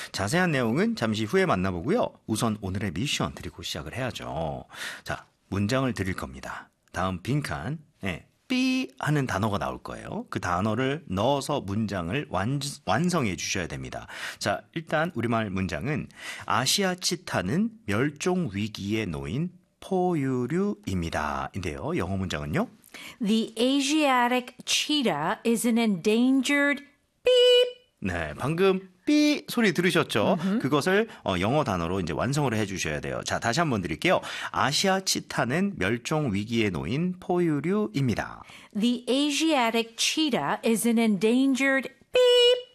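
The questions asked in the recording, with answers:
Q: The Asiatic cheetah is an endangered beep.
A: mammal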